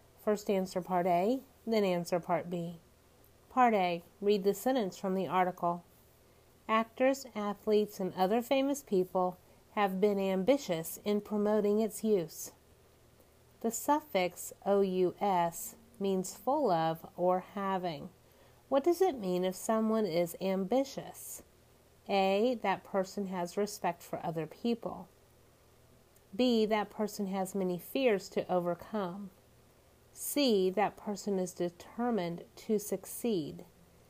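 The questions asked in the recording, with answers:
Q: What does it mean if someone is ambitious?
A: C: that person is determined to succeed.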